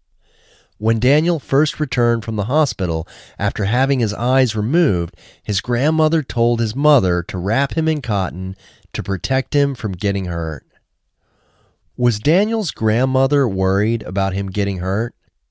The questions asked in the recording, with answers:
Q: Was Daniel's grandmother worried about him getting hurt?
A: Yes, his grandmother was worried about him getting hurt.